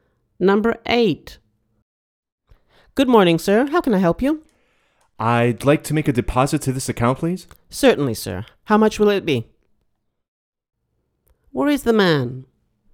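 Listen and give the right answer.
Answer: At the bank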